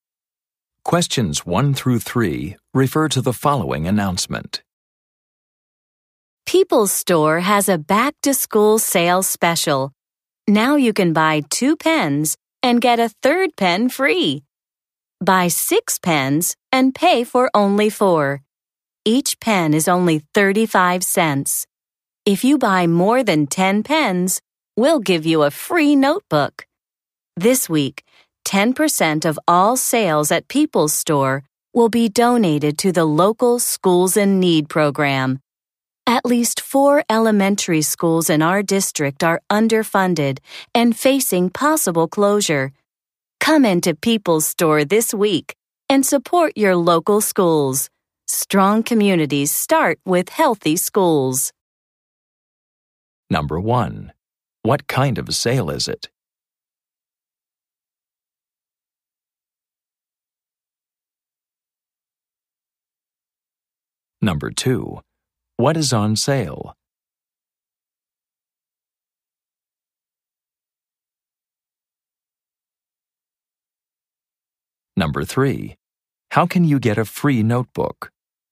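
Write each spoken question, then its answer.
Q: What kind of sale is it?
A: A back-to-school sale

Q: What is on sale?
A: Pens

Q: How can you get a free notebook?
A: Buy more than 10 pens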